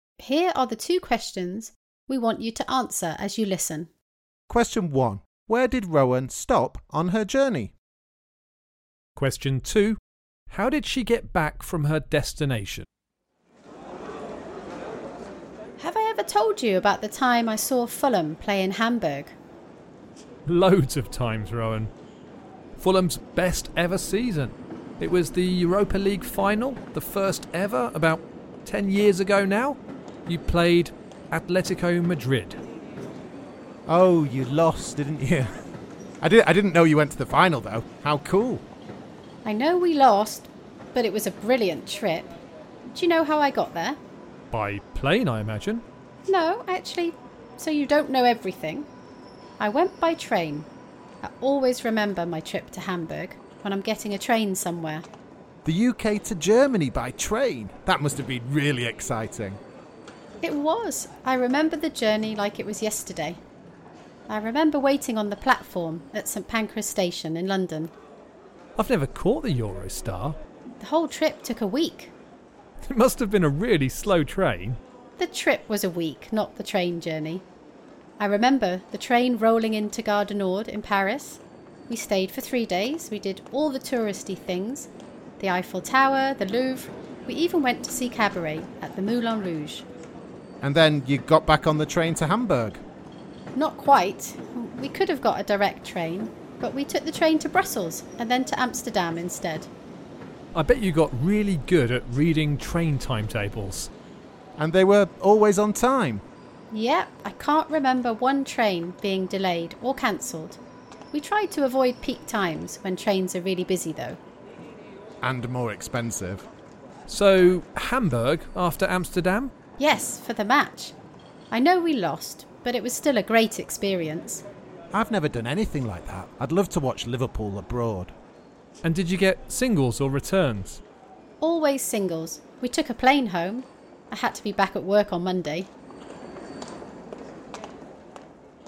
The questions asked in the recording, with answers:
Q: Where did Rowan stop on her journey?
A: I stopped in Paris, Brussels and Amsterdam on the way to Hamburg in Germany.

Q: How did she get back from her destination?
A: The answer was by plane.